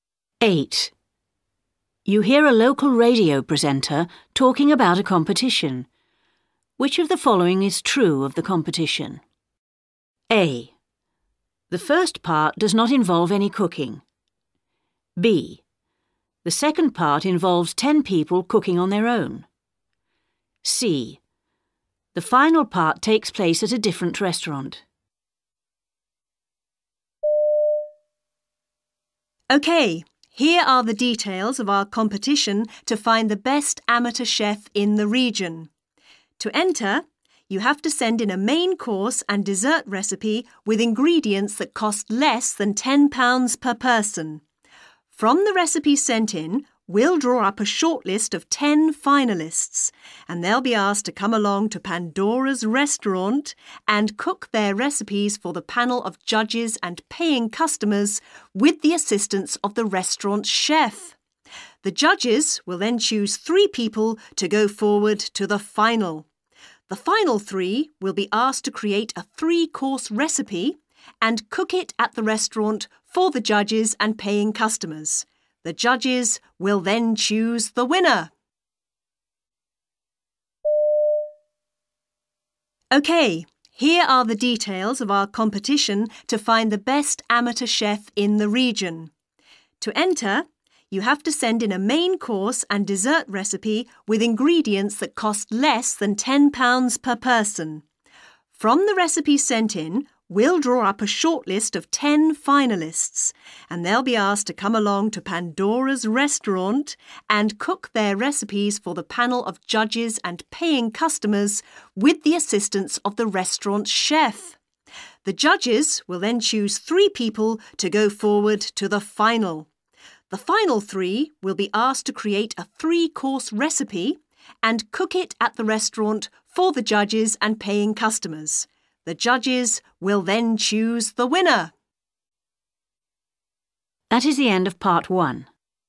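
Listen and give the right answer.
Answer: A: The first part does not involve any cooking.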